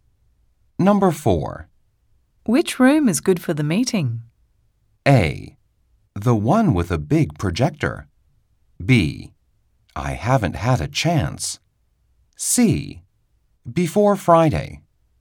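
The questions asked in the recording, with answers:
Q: Which room is good for the meeting?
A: A: The one with a big projector.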